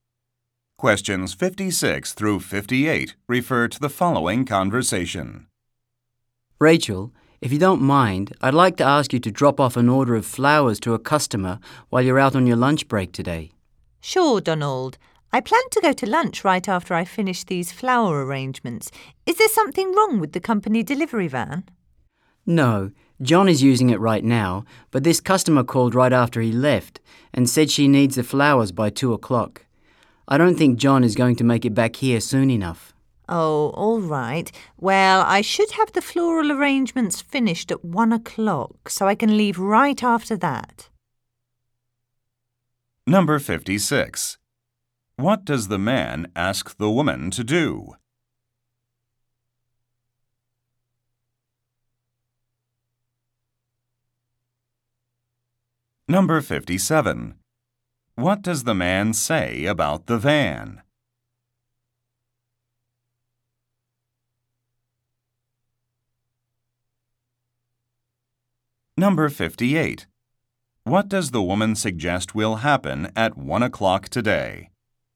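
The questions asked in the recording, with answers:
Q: What does the man ask the woman to do?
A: Deliver flowers to a customer

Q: What does the man say about the van?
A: John is using it

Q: What does the woman suggest will happen at 1 o'clock today?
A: She will finish the flower arrangements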